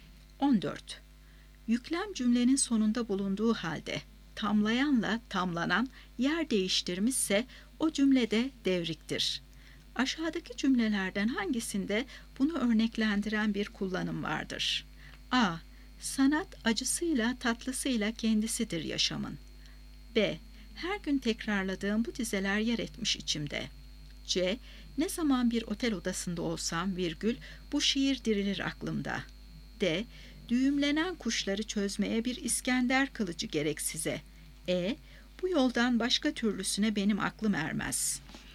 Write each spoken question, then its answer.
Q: Aşağıdaki cümlelerden hangisinde bunu örneklendiren bir kullanım vardır?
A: Doğru cevap A şıkkı. Sanat acısıyla, tatlısıyla kendisidir yaşamın.